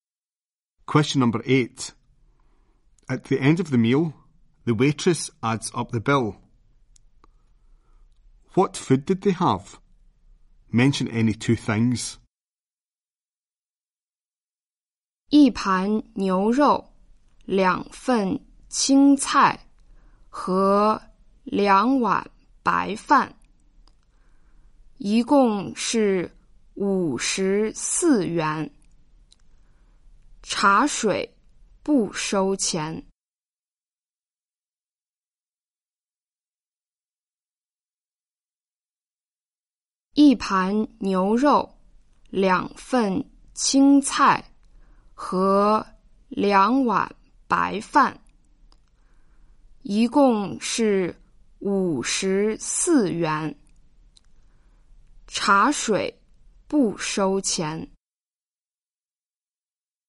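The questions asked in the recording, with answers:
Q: What food did they have? Mention any two things.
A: Beef, green vegetables, rice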